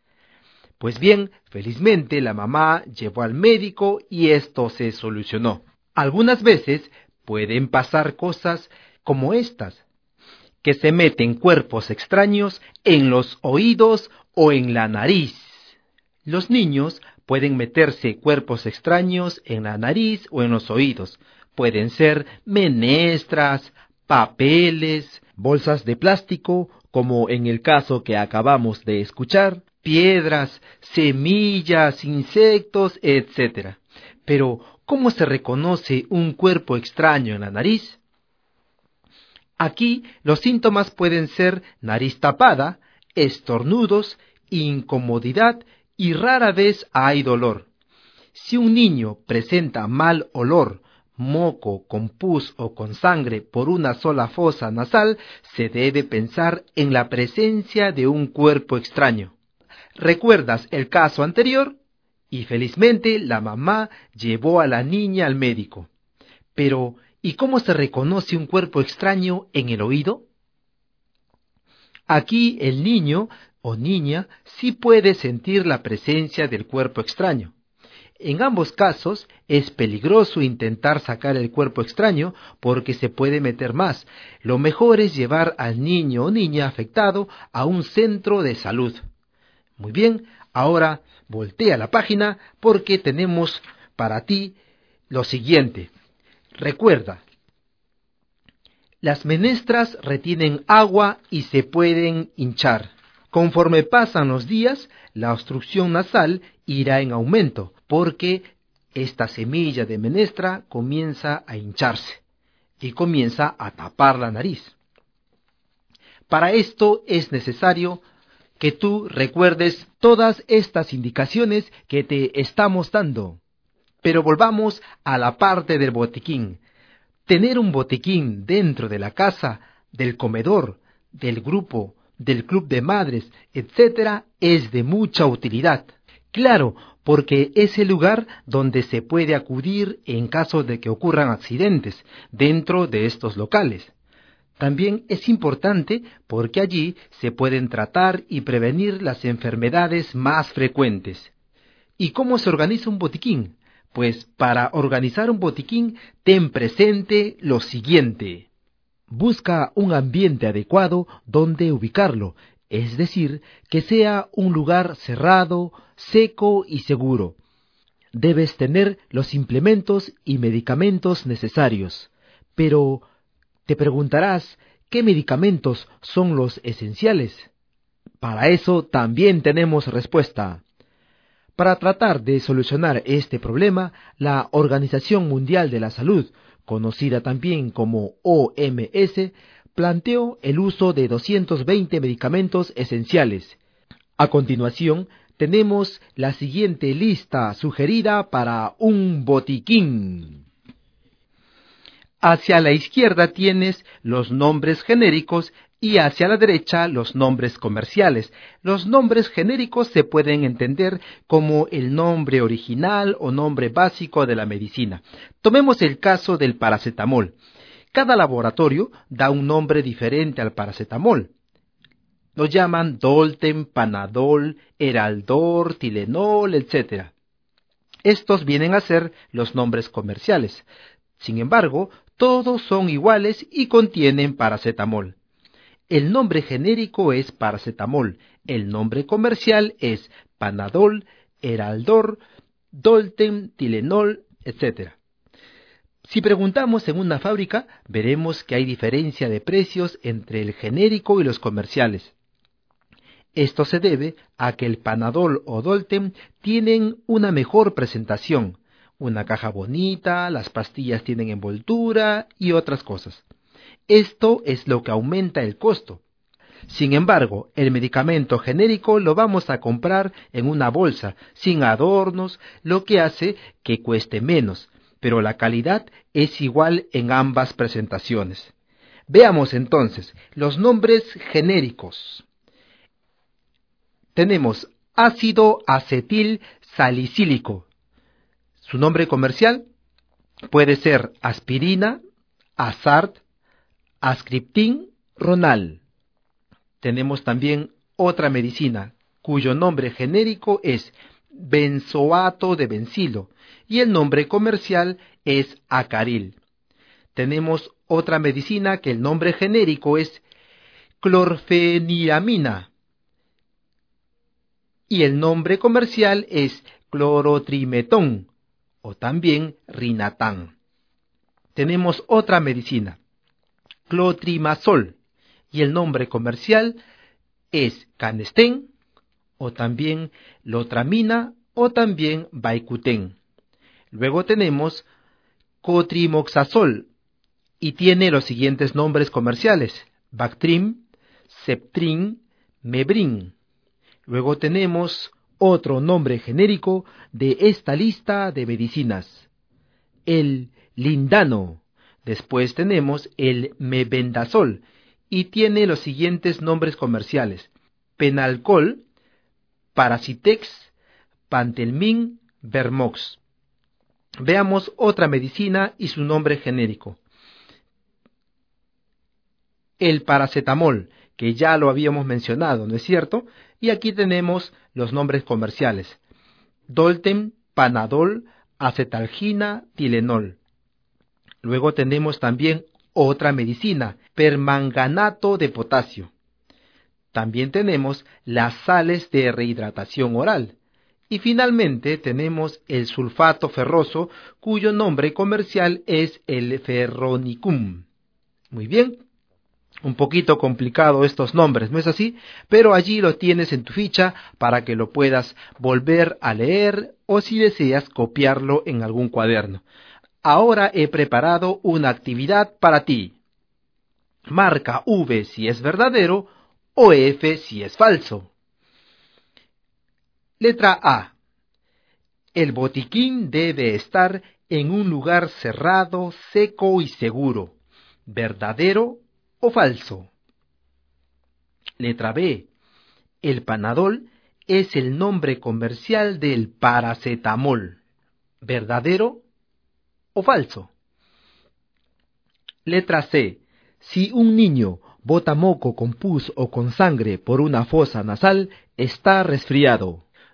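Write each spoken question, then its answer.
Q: El botiquín debe estar en un lugar cerrado, seco y seguro. ¿Verdadero o falso?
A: Verdadero

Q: El Panadol es el nombre comercial del paracetamol. ¿Verdadero o falso?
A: Verdadero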